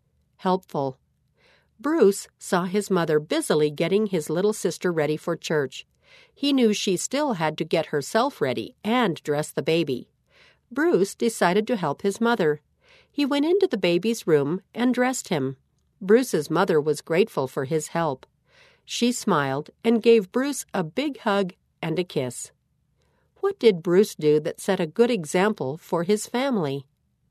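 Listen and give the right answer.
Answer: He helped his mother by dressing the baby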